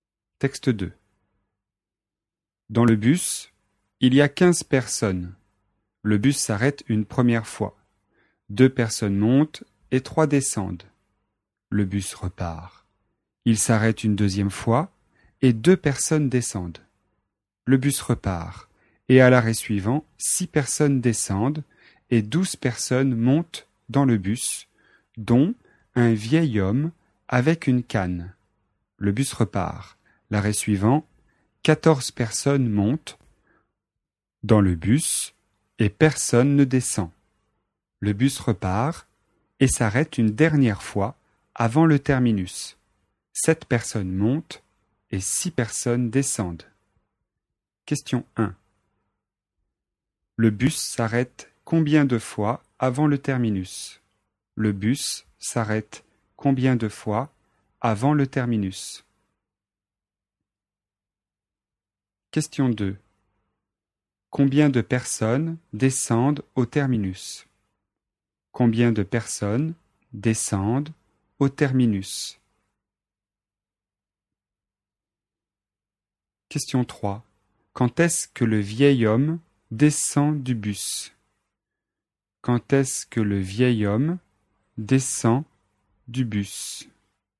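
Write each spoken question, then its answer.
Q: Le bus s'arrête combien de fois avant le terminus ?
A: 5 fois

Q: Combien de personnes descendent au terminus ?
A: 33 personnes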